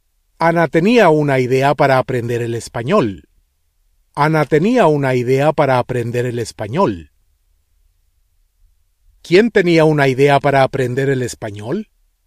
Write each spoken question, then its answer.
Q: ¿Quién tenía una idea para aprender el español?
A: Ana.